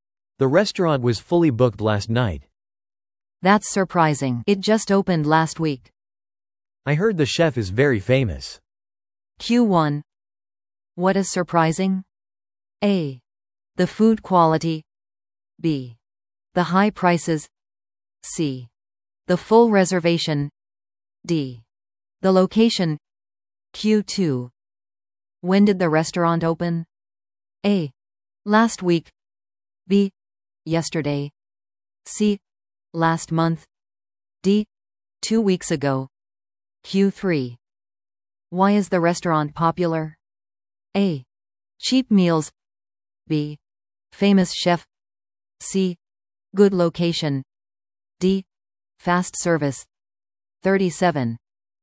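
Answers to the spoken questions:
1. C: The full reservation.
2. A: Last week.
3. B: Famous chef.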